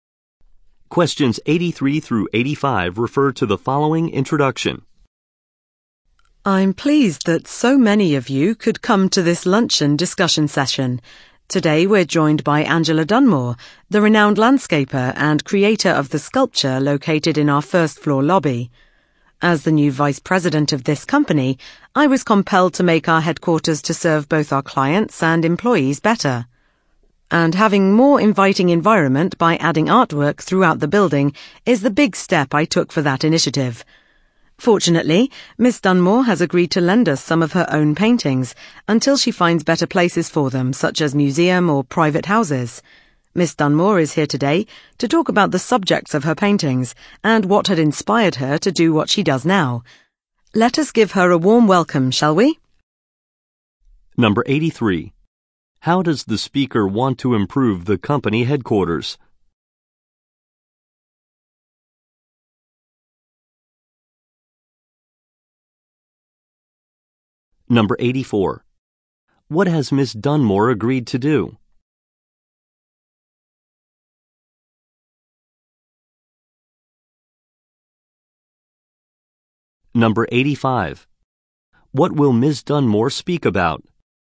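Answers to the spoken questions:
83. By adding artwork throughout the building
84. Lend some of her own paintings
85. The subjects of her paintings and her inspiration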